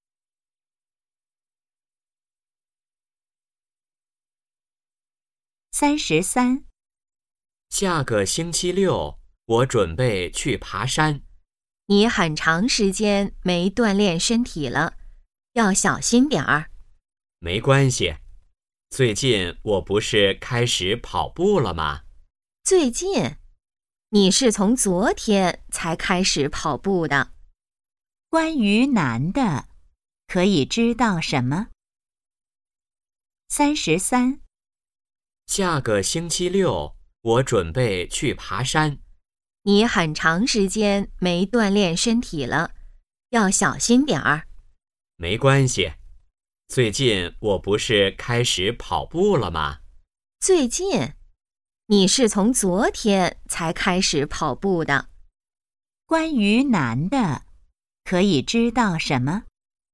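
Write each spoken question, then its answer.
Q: 关于男的,可以知道什么?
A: 昨天才开始跑步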